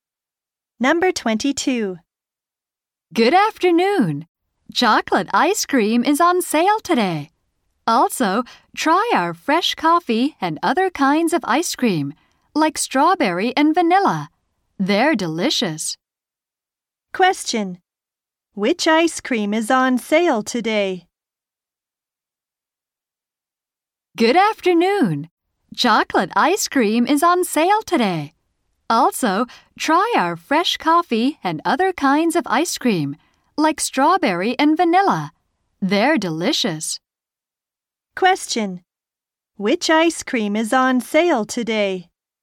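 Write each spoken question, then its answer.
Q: Which ice cream is on sale today?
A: Chocolate.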